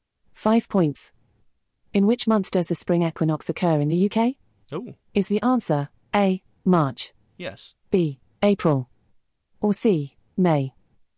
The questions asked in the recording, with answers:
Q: In which month does the spring equinox occur in the UK?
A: A, March.